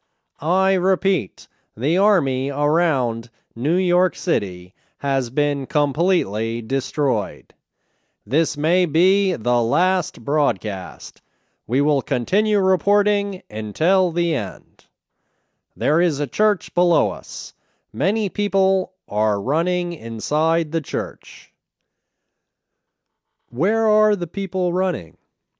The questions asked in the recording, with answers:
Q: Where are the people running?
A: They are running inside a church.